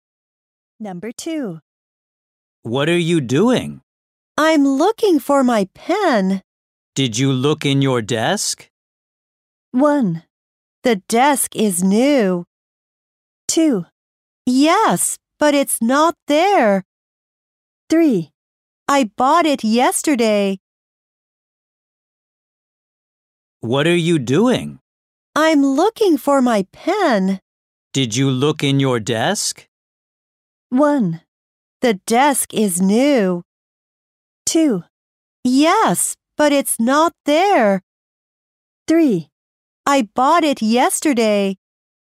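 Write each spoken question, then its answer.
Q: Did you look in your desk?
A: 2: Yes, but it's not there.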